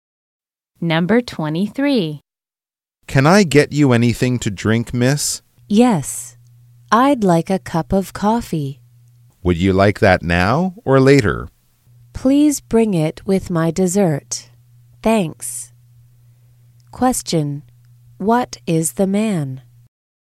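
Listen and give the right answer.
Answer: A waiter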